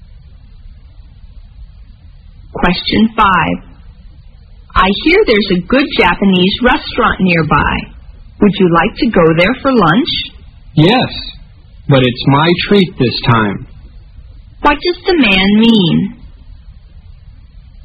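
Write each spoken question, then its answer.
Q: What does the man mean?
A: He will pay for lunch this time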